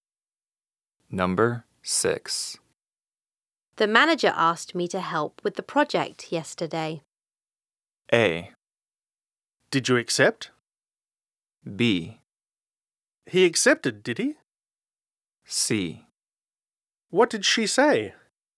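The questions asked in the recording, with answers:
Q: The manager asked me to help with the project yesterday.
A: A: Did you accept?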